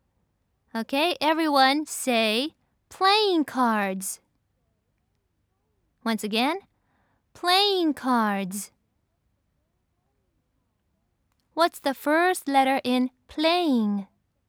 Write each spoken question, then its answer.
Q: What's the first letter in playing?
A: That's right, it's P.